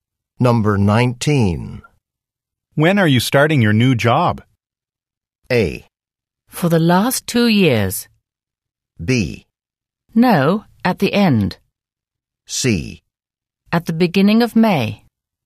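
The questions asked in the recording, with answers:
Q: When are you starting your new job?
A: C: At the beginning of May.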